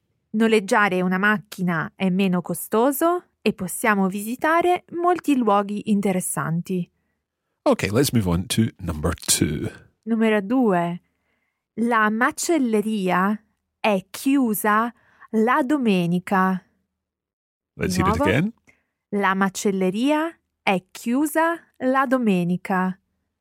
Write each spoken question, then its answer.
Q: La macelleria è chiusa la domenica.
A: the butcher's or the butcher shop is closed on Sundays